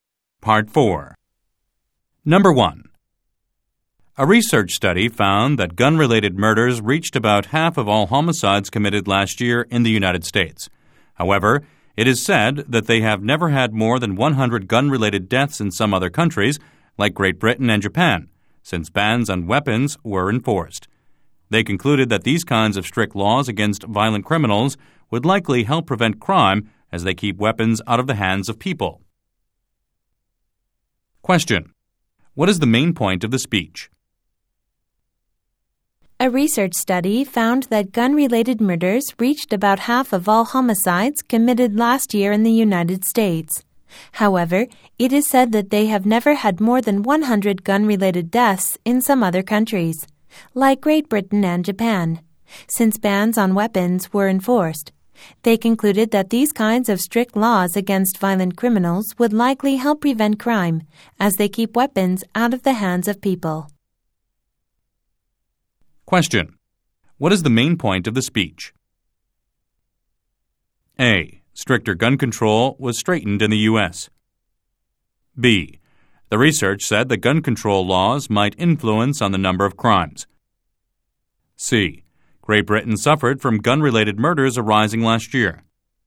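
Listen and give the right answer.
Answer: B: The research said that gun control laws might influence on the number of crimes.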